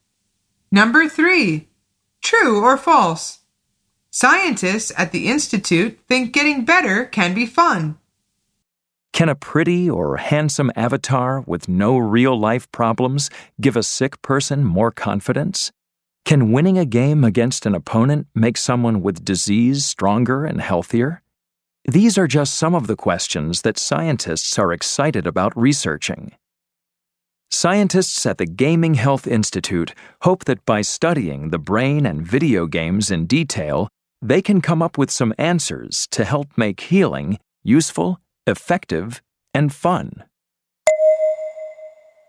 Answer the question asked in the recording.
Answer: The answer is true.